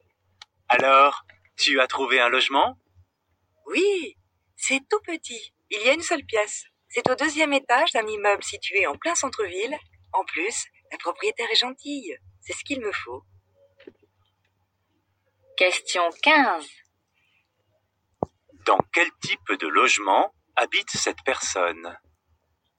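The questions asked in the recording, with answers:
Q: Dans quel type de logement habite cette personne?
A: Un studio (une seule pièce) en centre-ville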